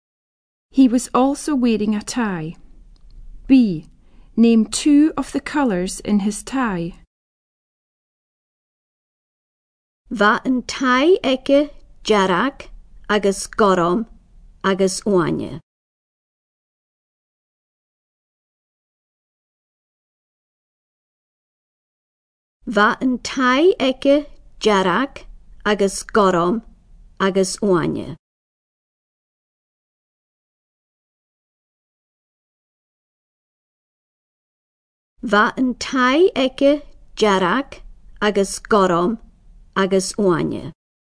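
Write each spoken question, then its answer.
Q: Name two of the colours in his tie.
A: Red, blue, green (any two)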